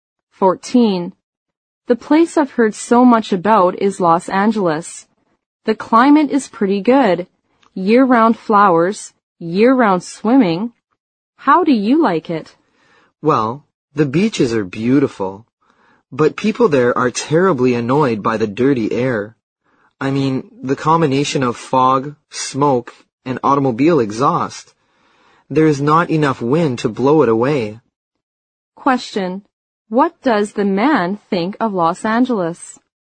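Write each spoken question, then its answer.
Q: What does the man think of Los Angeles?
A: The beaches are beautiful, but the air is dirty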